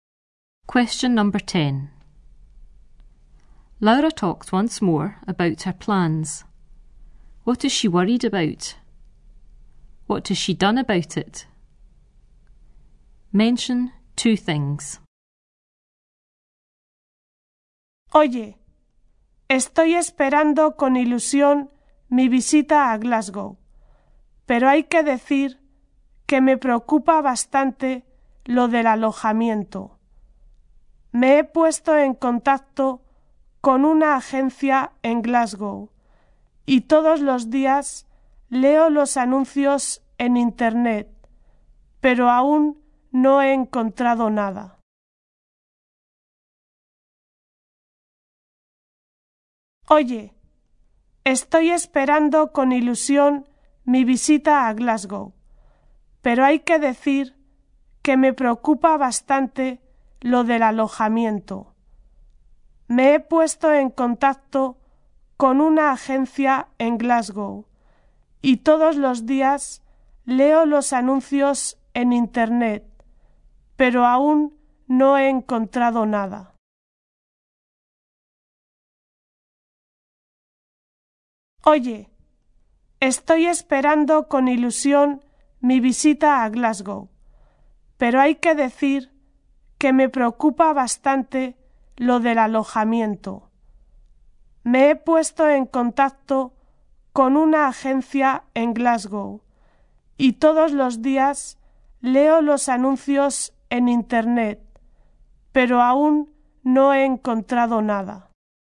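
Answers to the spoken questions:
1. Accommodation
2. Contacted an agency in Glasgow; reads internet adverts every day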